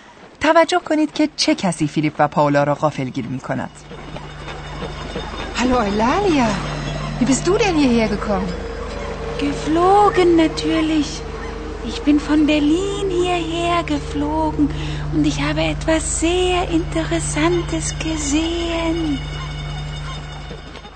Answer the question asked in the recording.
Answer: بله، این ایلالیا جغد سخنگوست که ناگهان از هامبورگ سر درآورده است.